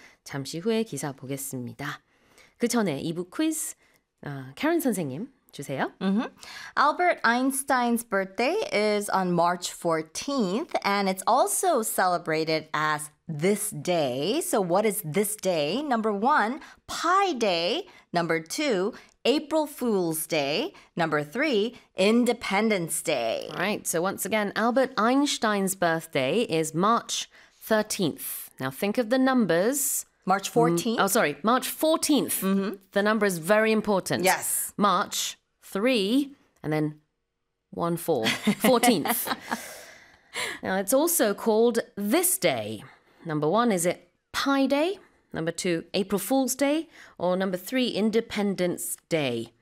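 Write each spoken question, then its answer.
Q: So what is this day? Number one, Pi Day. Number two, April Fool's Day. Number three, Independence Day.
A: 1: Pi Day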